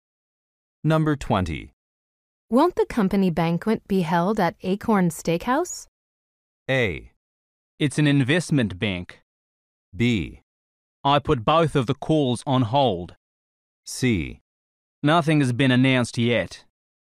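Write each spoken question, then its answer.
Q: Won't the company banquet be held at Acorn Steakhouse?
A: C: Nothing has been announced yet.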